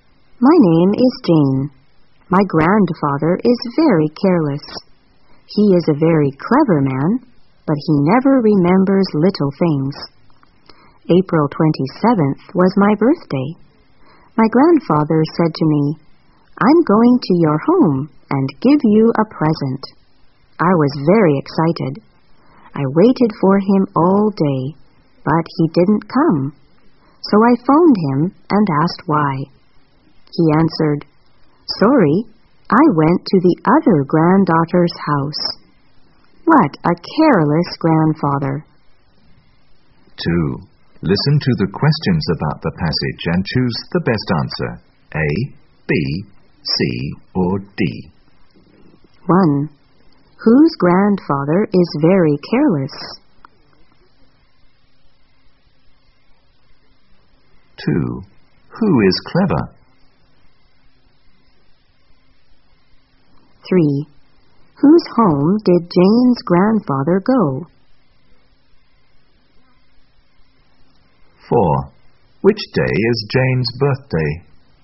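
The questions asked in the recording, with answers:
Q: Whose grandfather is very careless?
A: Jane's

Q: Who is clever?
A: Jane's grandfather

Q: Whose home did Jane's grandfather go?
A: His other granddaughter's

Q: Which day is Jane's birthday?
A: April 27th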